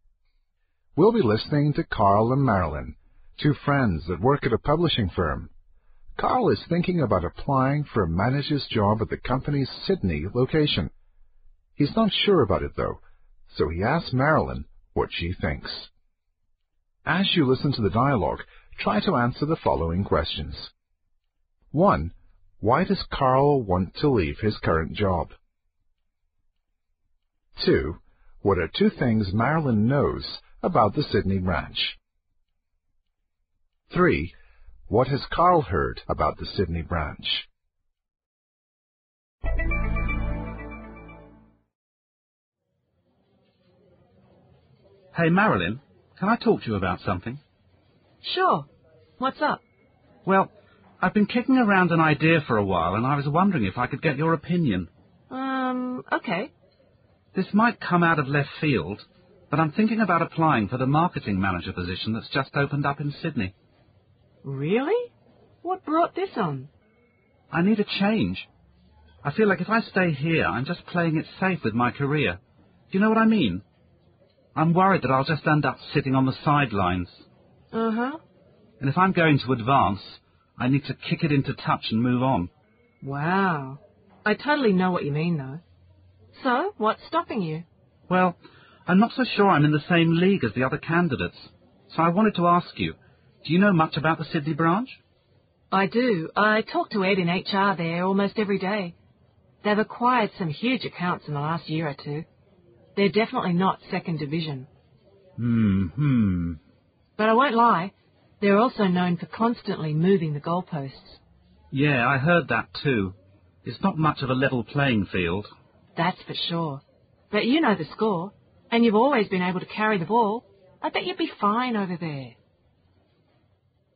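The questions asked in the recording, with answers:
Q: Why does Carl want to leave his current job?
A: He needs a change; staying is playing it safe and he can't advance

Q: What are two things Marilyn knows about the Sydney branch?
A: It has acquired huge accounts and is known for constantly moving the goalposts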